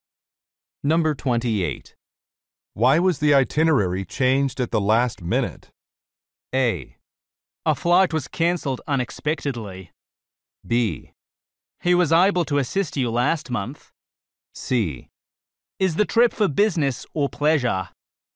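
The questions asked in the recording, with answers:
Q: Why was the itinerary changed at the last minute?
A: A: A flight was cancelled unexpectedly.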